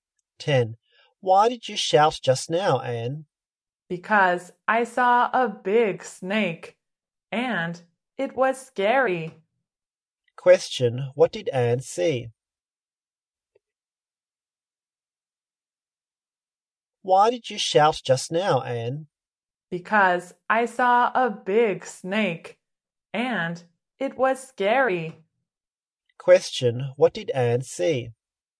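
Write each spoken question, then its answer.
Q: what did Anne see?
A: A big snake.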